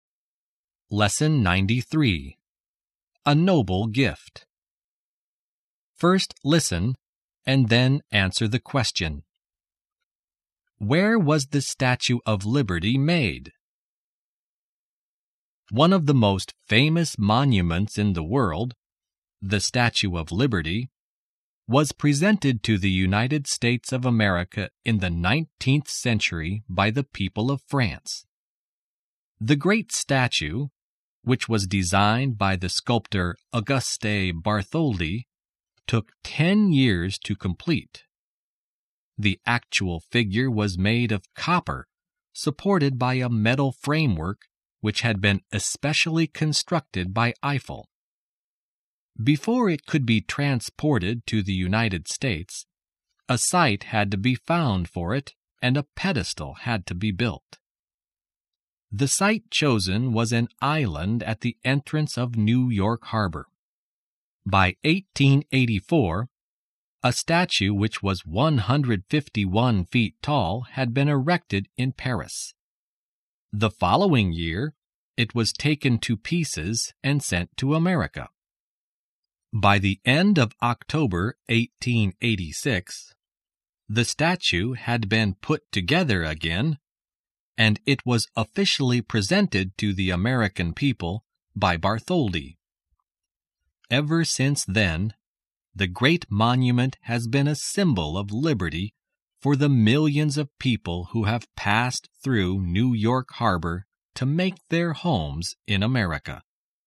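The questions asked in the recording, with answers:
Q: Where was the Statue of Liberty made?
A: In Paris, France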